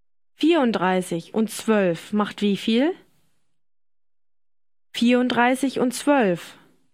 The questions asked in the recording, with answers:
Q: 34 und 12 macht wie viel?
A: 46. 34 und 12 macht 46.